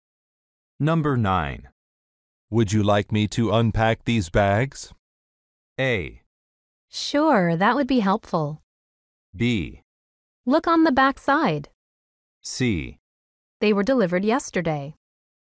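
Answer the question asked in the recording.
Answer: A: Sure, that would be helpful.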